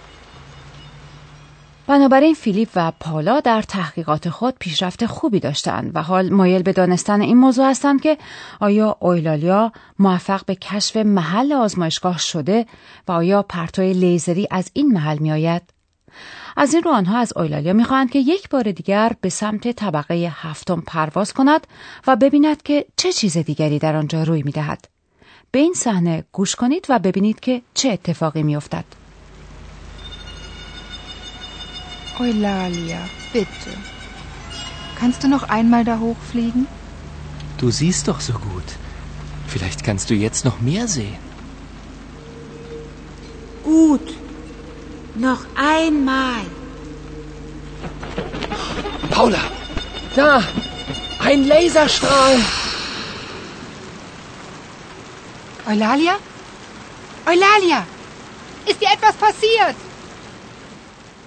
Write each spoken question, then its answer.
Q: به این صحنه گوش کنید و ببینید که چه اتفاقی افتد.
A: اما به ناگهان بار دیگر پرتوی لیزری مشاهده می شود